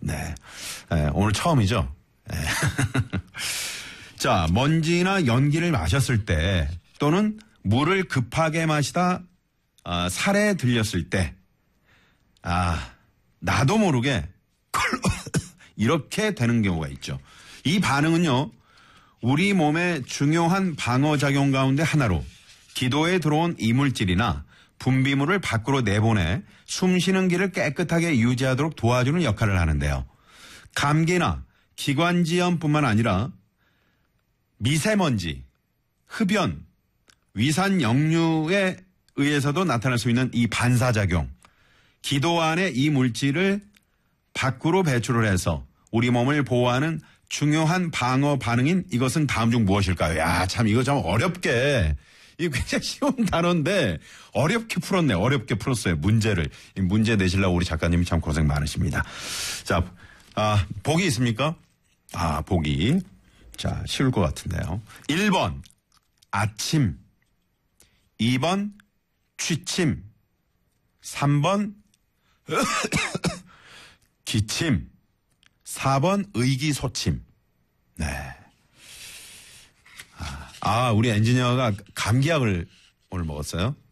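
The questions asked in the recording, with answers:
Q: 감기나 기관지염뿐만 아니라 미세먼지, 흡연, 위산 역류에 의해서도 나타날 수 있는 이 반사작용, 기도 안에 이 물질을 밖으로 배출을 해서 우리 몸을 보호하는 중요한 방어 반응인 이것은 다음 중 무엇일까요?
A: 3번: 기침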